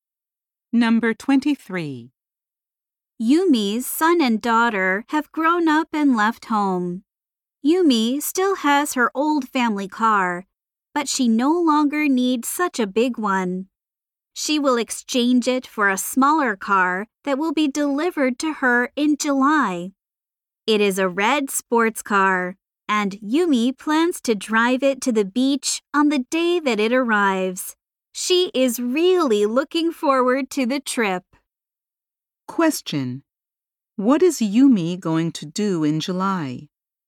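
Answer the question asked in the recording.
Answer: Get a smaller car and drive it to the beach.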